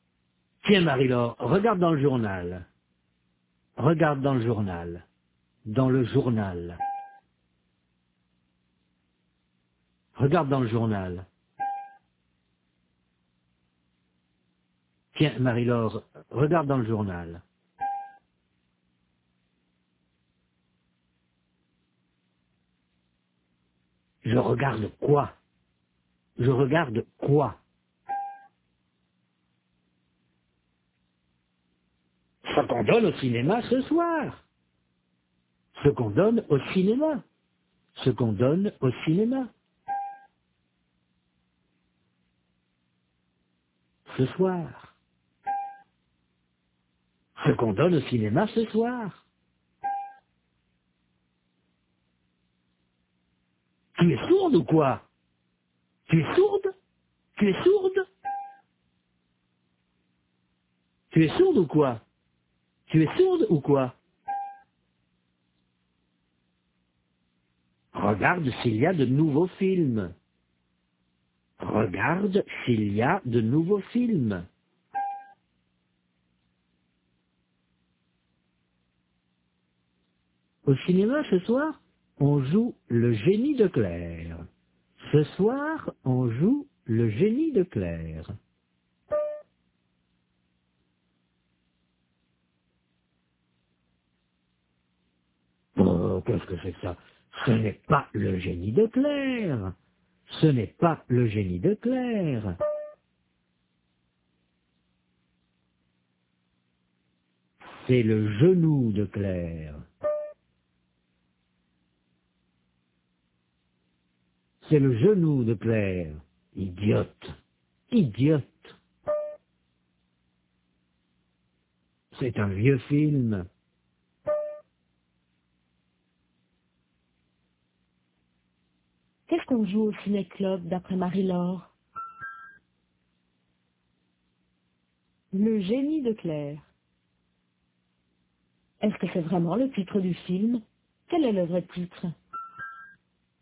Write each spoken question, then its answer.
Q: Qu'est-ce qu'on joue au ciné-club d'après Marie-Laure?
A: Le génie de Claire.

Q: Quel est le vrai titre?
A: C'est le genou de Claire.